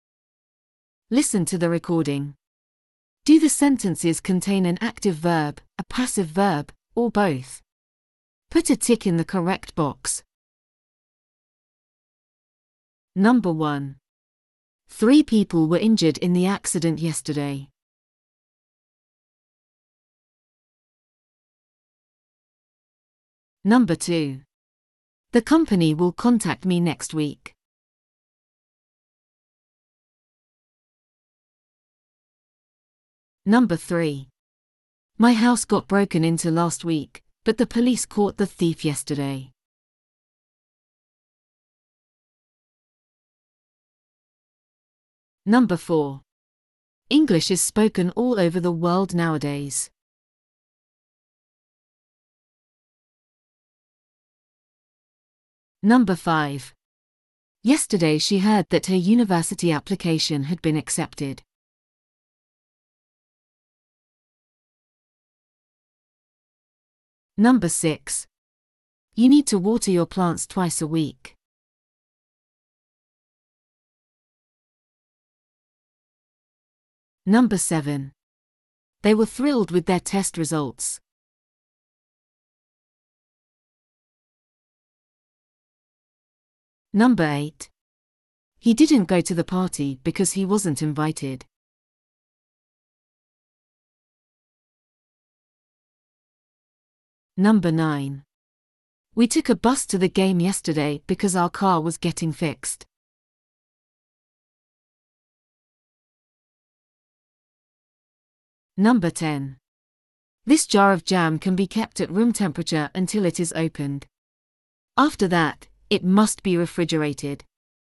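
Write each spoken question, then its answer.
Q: 3 people were injured in the accident yesterday.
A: passive

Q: The company will contact me next week.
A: active

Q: My house got broken into last week, but the police caught the thief yesterday.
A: both

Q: English is spoken all over the world nowadays.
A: passive

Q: Yesterday she heard that her university application had been accepted.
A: both

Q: You need to water your plants twice a week.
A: active

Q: He didn't go to the party because he wasn't invited.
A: both

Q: We took a bus to the game yesterday because our car was getting fixed.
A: both

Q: This jar of jam can be kept at room temperature until it is opened. After that, it must be refrigerated.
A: passive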